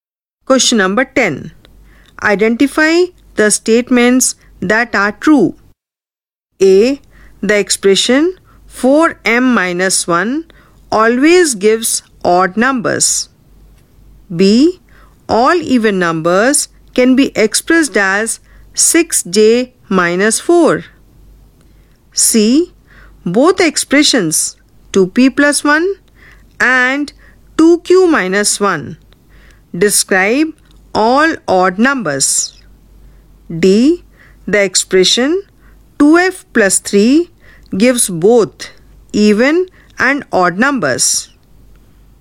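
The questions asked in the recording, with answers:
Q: Identify the statements that are true.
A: A: The expression 4m-1 always gives odd numbers; C: Both expressions 2p+1 and 2q-1 describe all odd numbers.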